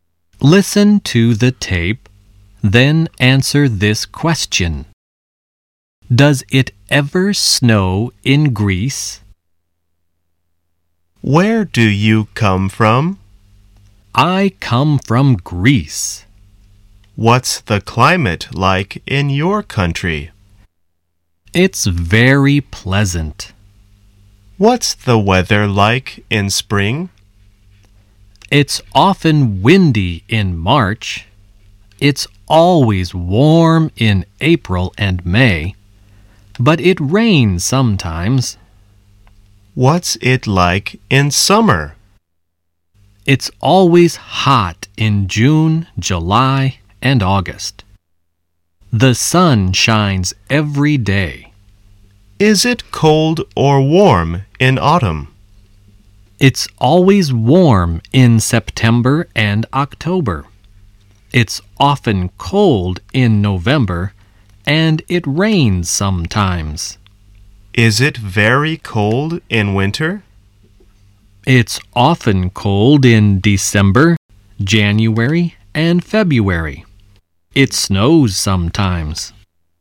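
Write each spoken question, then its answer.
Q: Does it ever snow in Greece?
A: Yes, it snows sometimes (in winter).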